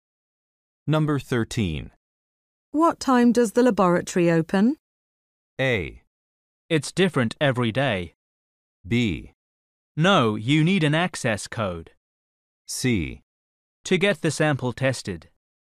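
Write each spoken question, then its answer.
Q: What time does the laboratory open?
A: A: It's different every day.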